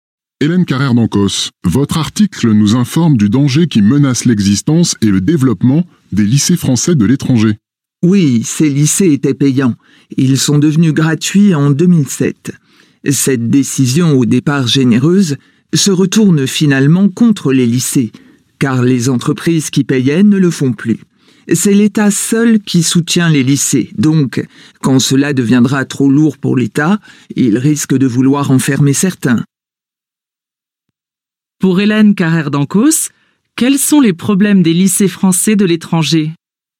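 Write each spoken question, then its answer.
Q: Pour Hélène Carrère-Dancos, quels sont les problèmes des lycées français de l'étranger ?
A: Devenus gratuits en 2007, ils ne sont plus financés par les entreprises ; seul l'État les soutient et il risque d'en fermer certains.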